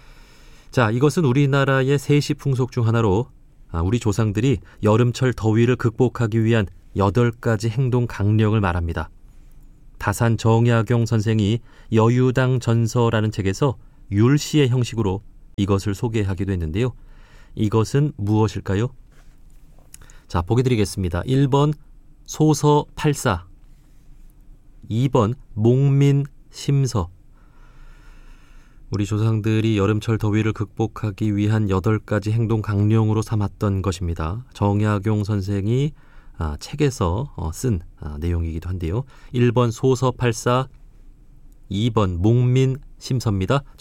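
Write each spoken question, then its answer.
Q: 이것은 무엇일까요?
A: 1: 소서 팔사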